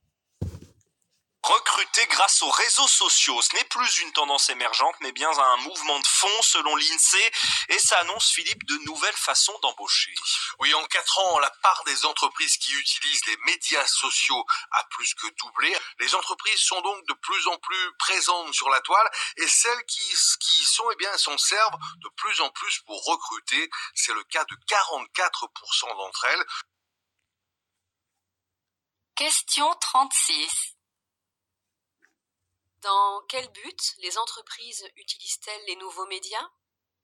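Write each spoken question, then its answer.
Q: Dans quel but les entreprises utilisent-elles les nouveaux médias ?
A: Pour recruter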